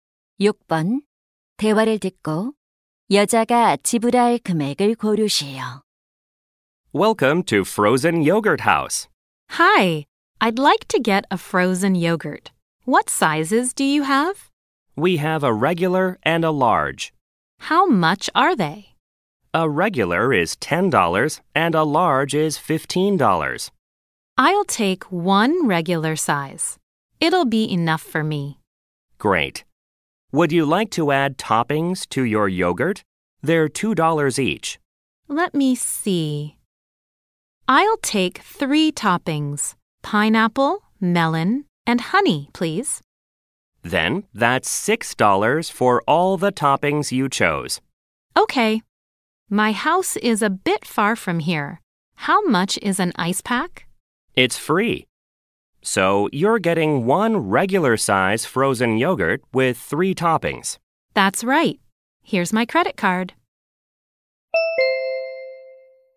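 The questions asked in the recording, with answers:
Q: 대화를 듣고 여자가 지불할 금액을 고르시오.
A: $16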